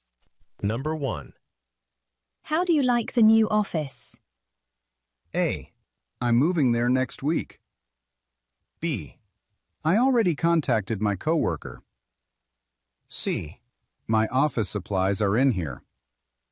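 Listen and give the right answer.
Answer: A: I'm moving there next week.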